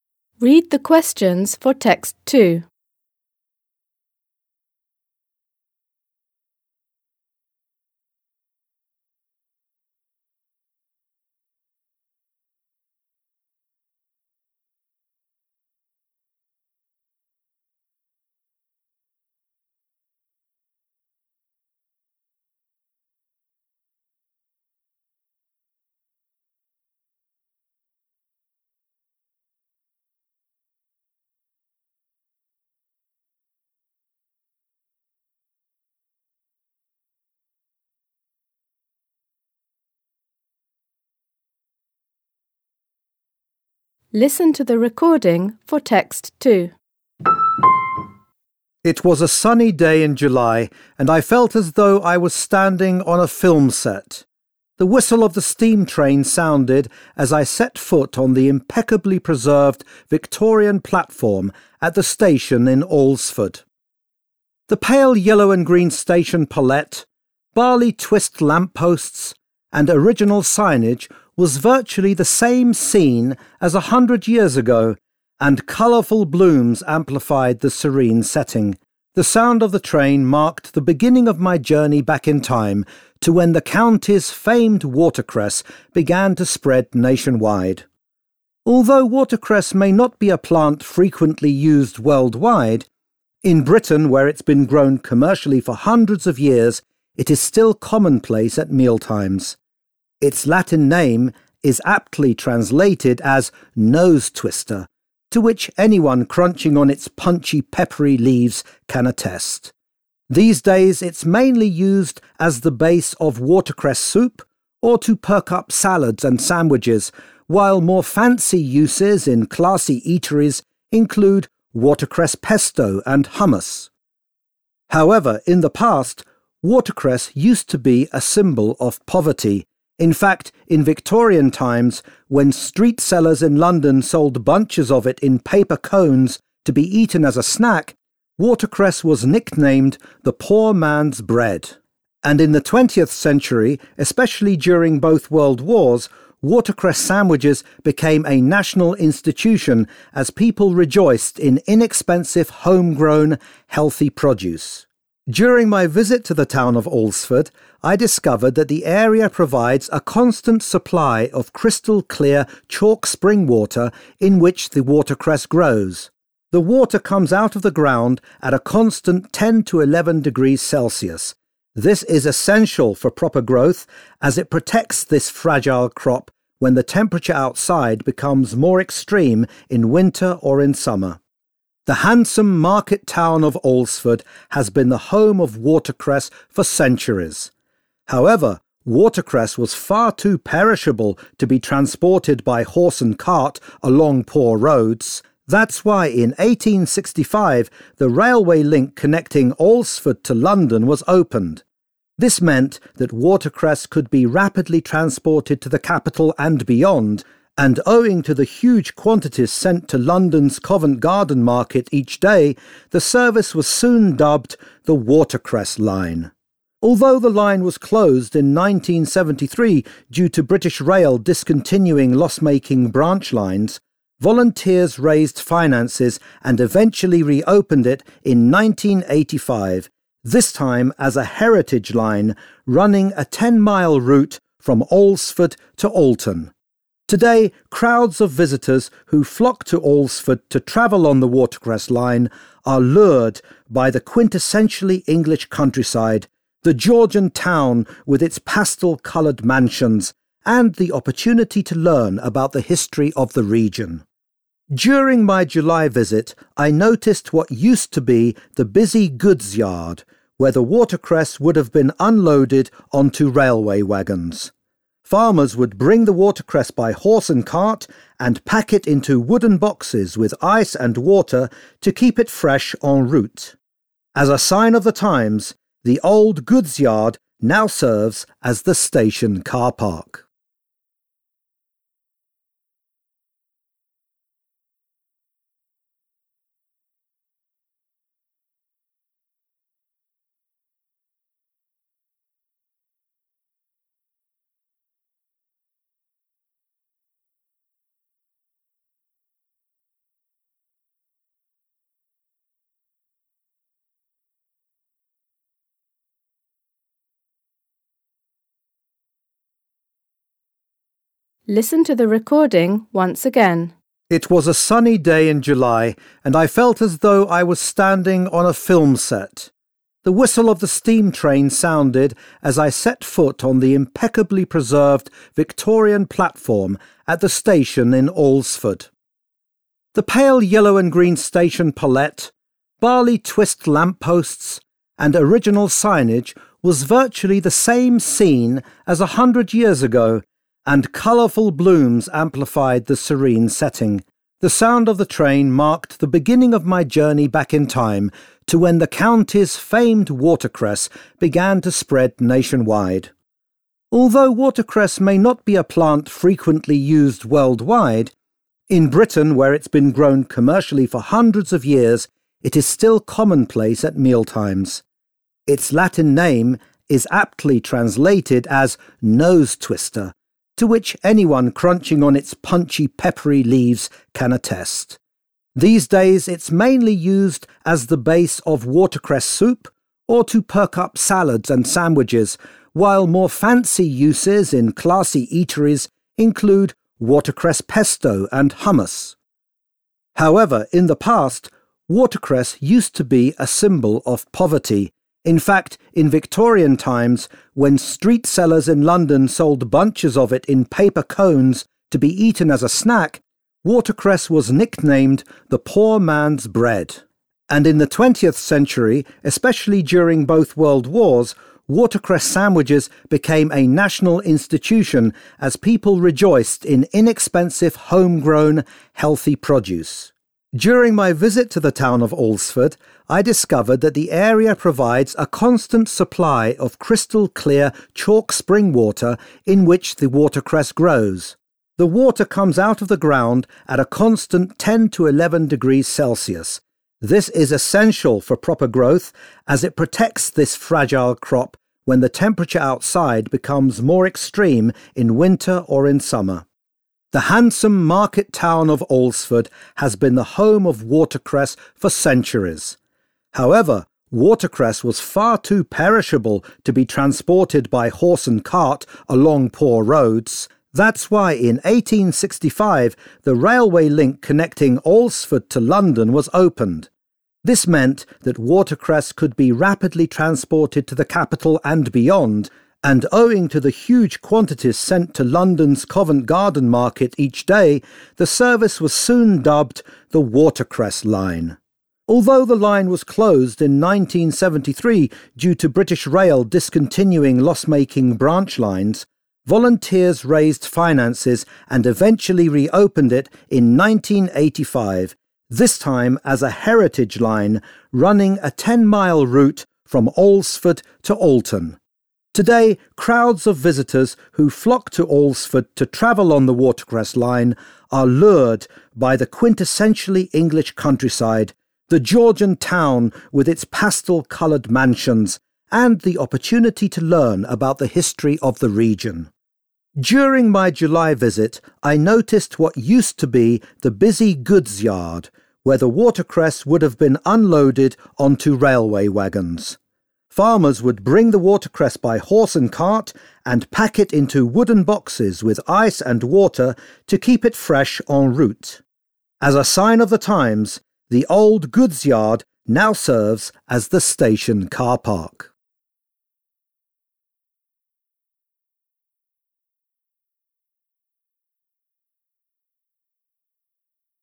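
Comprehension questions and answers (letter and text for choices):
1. Based on the description of the station, it can be concluded that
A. it faithfully captures the spirit of a bygone era.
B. its architecture was the inspiration for a scene in a film.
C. it has been considerably altered in the last hundred years.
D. its peaceful atmosphere stirred up mixed emotions in the speaker.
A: A. it faithfully captures the spirit of a bygone era.

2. The speaker points out that watercress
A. is used globally to a greater extent than in Britain these days.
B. is looked down upon nowadays as food suited for the poor.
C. is erroneously believed to have a spicy flavour.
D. is sensitive to temperature fluctuations.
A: D. is sensitive to temperature fluctuations.

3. When talking about the revival of the 'Watercress Line', the speaker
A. voices his concern that tourists' interest in the service might be fleeting.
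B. advocates expanding the present rail service in the future.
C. draws attention to the purpose the line serves nowadays.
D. speculates how the line could regain its former glory.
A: C. draws attention to the purpose the line serves nowadays.

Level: Poziom: dwujęzyczny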